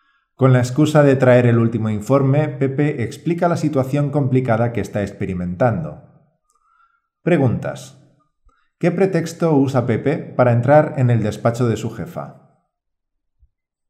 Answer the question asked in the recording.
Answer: El pretexto de traerla el último informe.